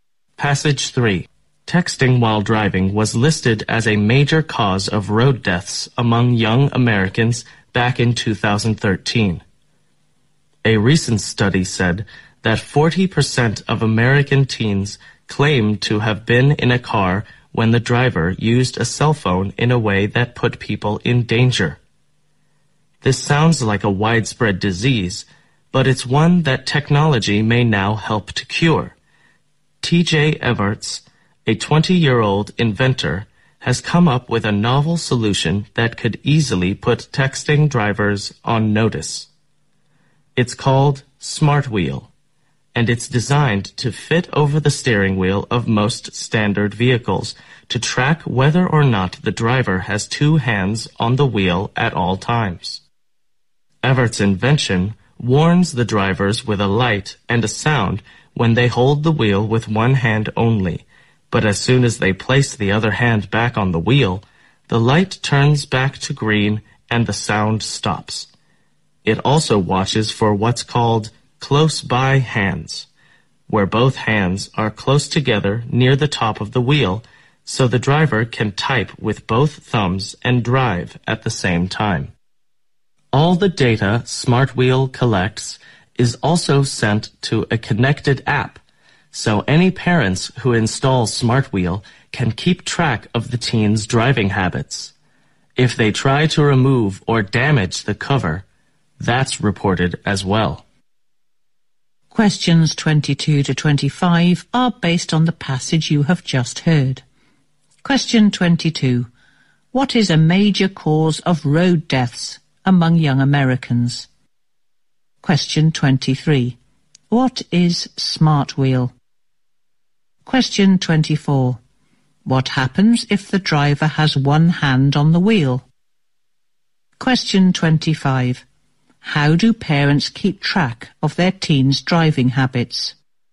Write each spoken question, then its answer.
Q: What is a major cause of road deaths among young Americans?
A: Texting while driving is one of the major causes to road deaths in America.

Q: What is Smart Wheel?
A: Smart wheel is a novel solution invented by a 20-year-old inventor.

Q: What happens if the driver has one hand on the wheel?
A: The smart wheel may send off light and sound to warn the drivers.

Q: How do parents keep track of their teen's driving habits?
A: Because the data smart wheel collects is sent to a connected APP.